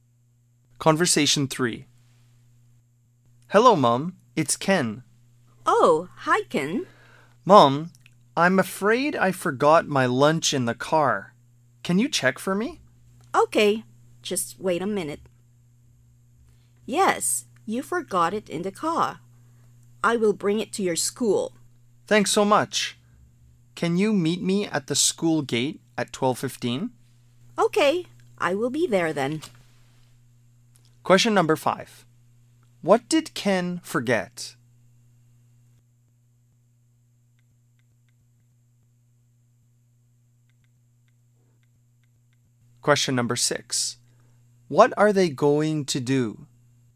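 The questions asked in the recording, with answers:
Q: What did Ken forget?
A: His lunch

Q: What are they going to do?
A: Meet at the school gate at 12:15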